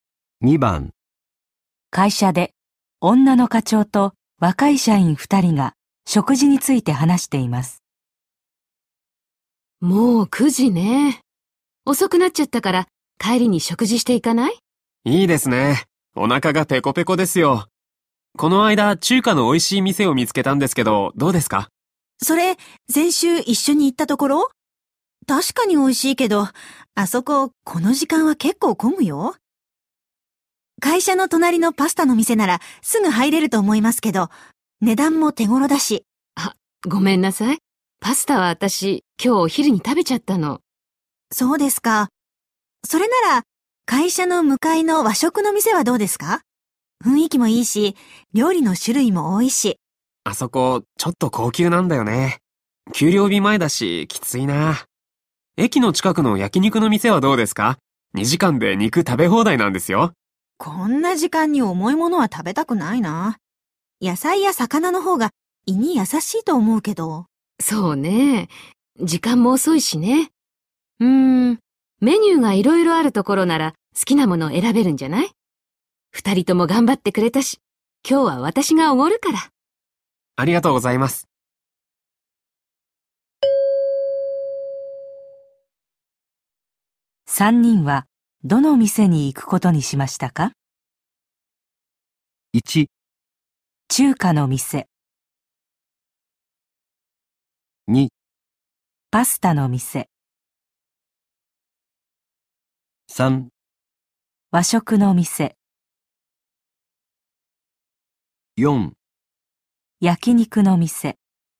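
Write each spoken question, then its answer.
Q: 三人はどの店に行くことにしましたか?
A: 3: 和食の店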